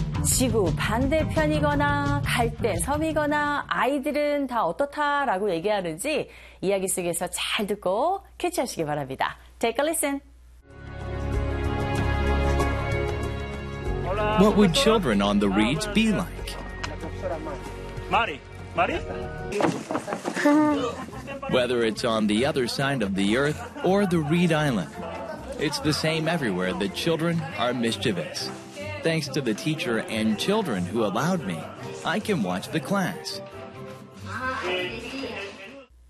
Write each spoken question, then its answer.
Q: 지구 반대편이거나 갈대 섬이거나 아이들은 다 어떻다라고 얘기하는지 이야기 속에서 잘 듣고 캐치하시기 바랍니다.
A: Children are mischievous 라고 합니다.